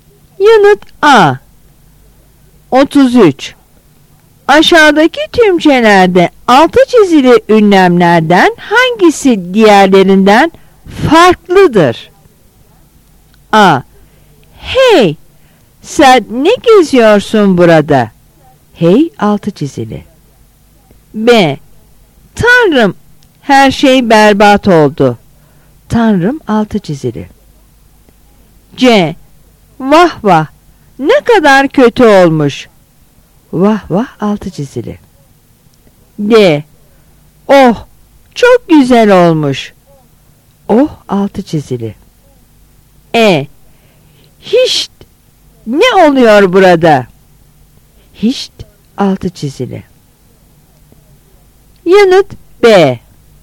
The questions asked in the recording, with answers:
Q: Aşağıdaki tümcelerde altı çizili ünlemlerden hangisi diğerlerinden farklıdır?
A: Yanıt B.